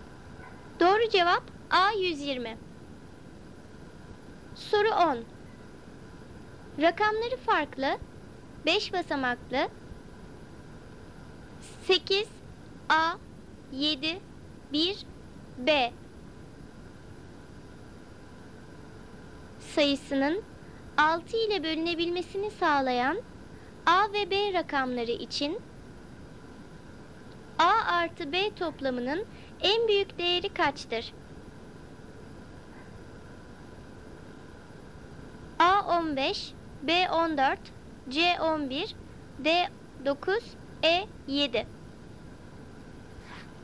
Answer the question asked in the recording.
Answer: Doğru cevap C 11.